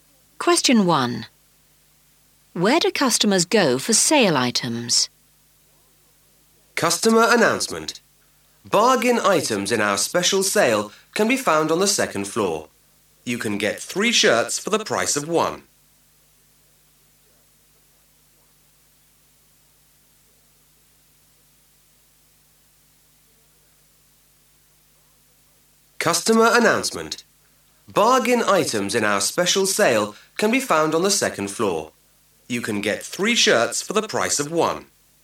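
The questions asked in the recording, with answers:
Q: Where do customers go for sale items?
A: The second floor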